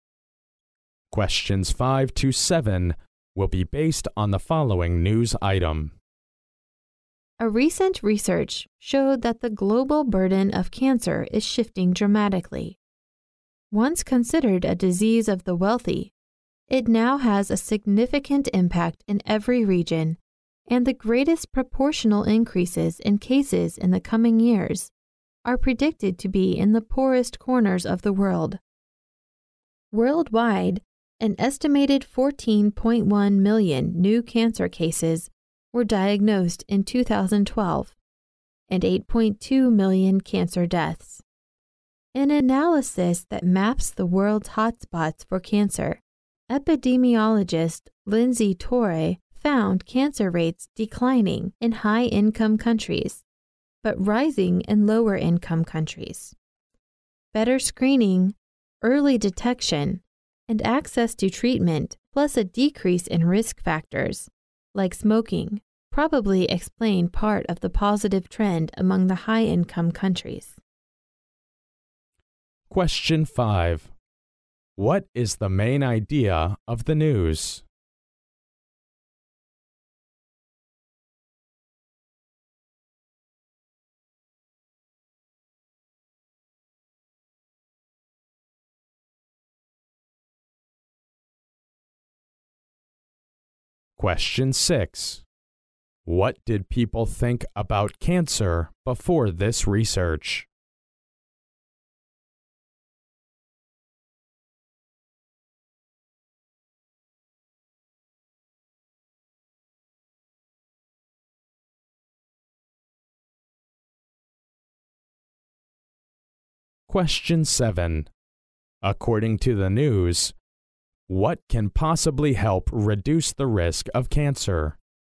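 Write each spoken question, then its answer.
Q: What is the main idea of the news?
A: The global burden of cancer is shifting dramatically toward poorer, lower-income countries.

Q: What did people think about cancer before this research?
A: They thought it was a disease of the wealthy.

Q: According to the news, what can possibly help reduce the risk of cancer?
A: Better screening, early detection, access to treatment, and fewer risk factors like smoking.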